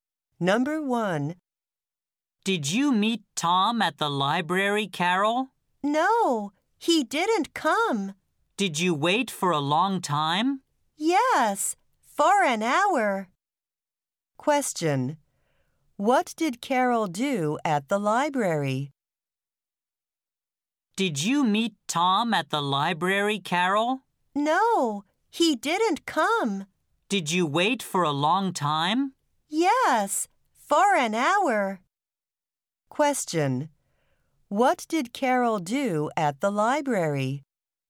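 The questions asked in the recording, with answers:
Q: What did Carol do at the library?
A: She waited for Tom for an hour.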